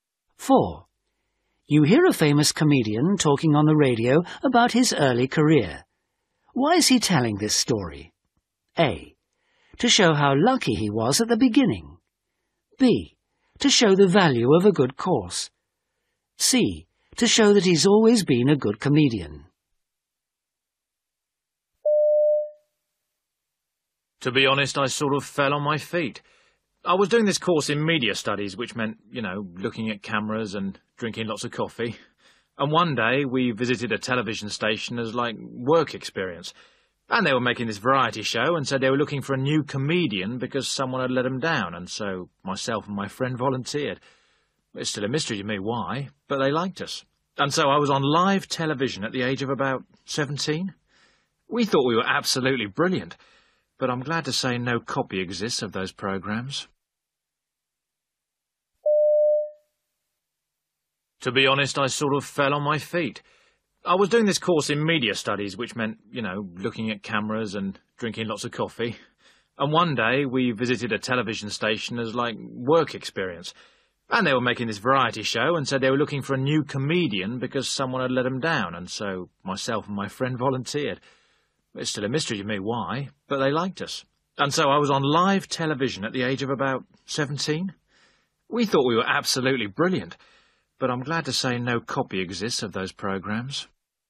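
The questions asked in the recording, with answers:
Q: Why is he telling this story?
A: A: To show how lucky he was at the beginning.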